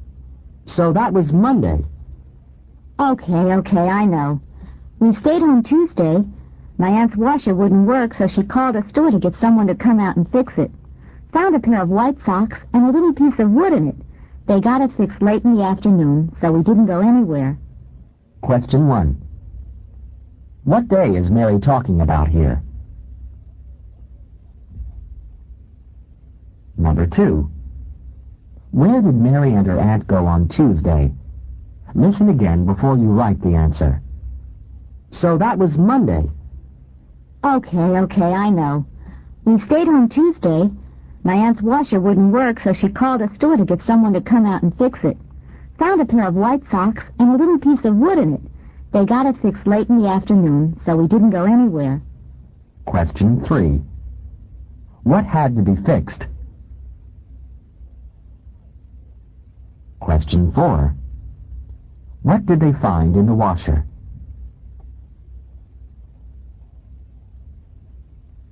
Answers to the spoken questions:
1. Number 1, Tuesday
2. Number 2, they didn't go anywhere.
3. Number 3, her aunt's washer
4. Number 4, they found a pair of white socks and a little piece of wood.